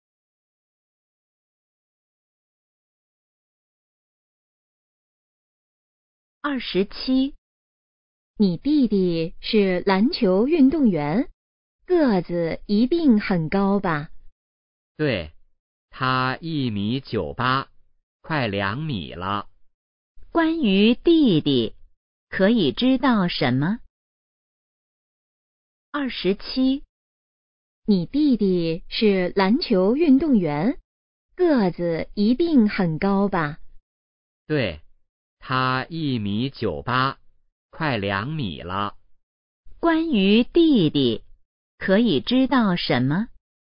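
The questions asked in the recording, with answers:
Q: 关于弟弟,可以知道什么?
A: 个子很高,快2米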